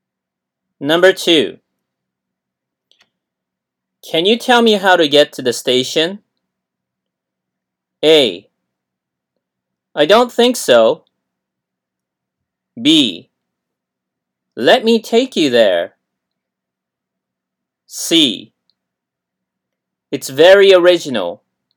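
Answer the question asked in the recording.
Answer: B: Let me take you there.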